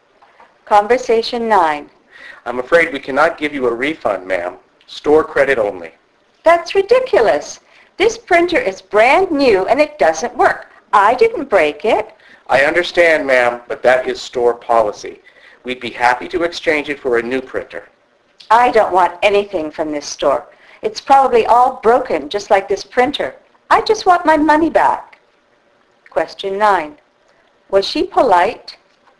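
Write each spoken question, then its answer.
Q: Was she polite?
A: No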